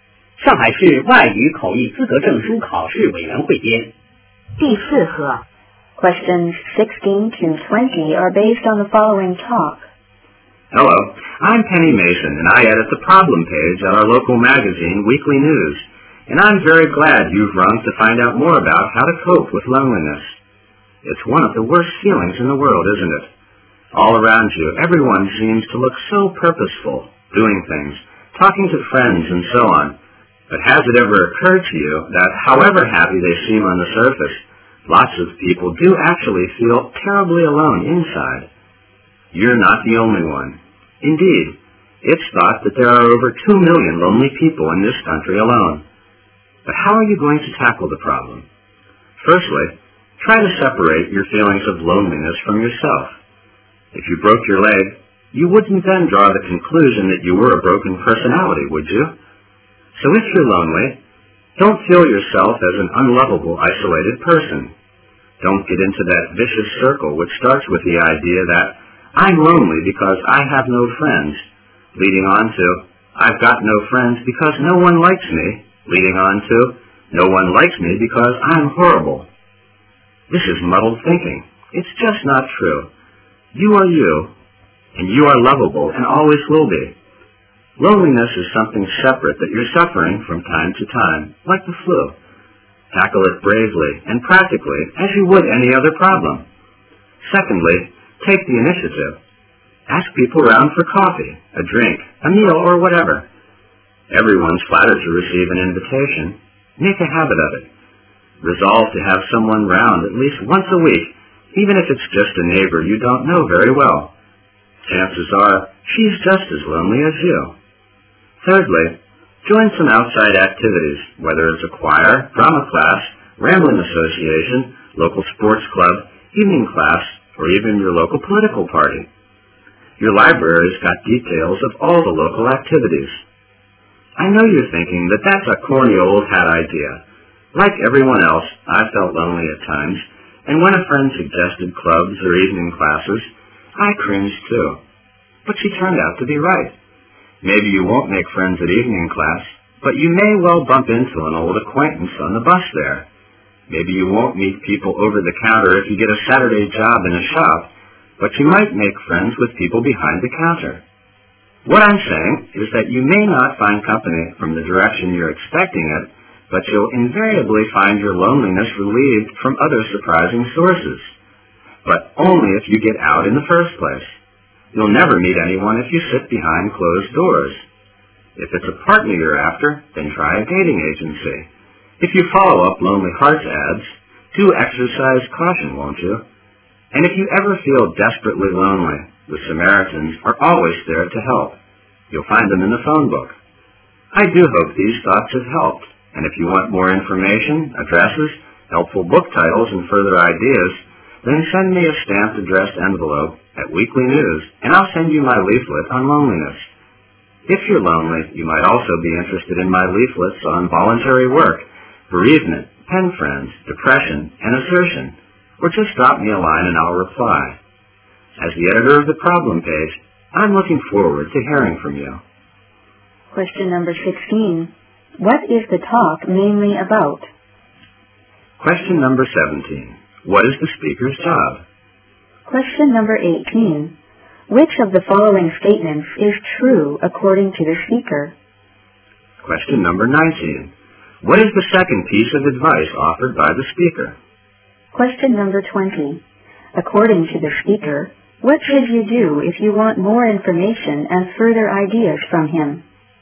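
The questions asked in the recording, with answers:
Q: What is the talk mainly about?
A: How to cope with loneliness

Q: What is the speaker's job?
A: She edits the problem page of the local magazine Weekly News

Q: What is the second piece of advice offered by the speaker?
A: Take the initiative: invite people round for coffee, a drink or a meal

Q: According to the speaker, what should you do if you want more information and further ideas from him?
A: Send a stamped addressed envelope to her at Weekly News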